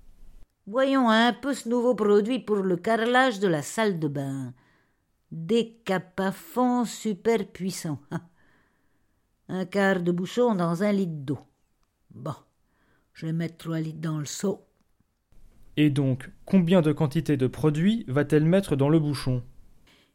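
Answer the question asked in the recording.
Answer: Trois quarts de bouchon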